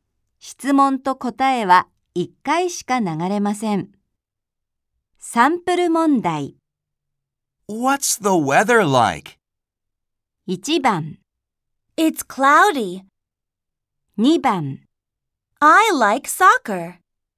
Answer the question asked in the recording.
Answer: 1番が答えだとわかります。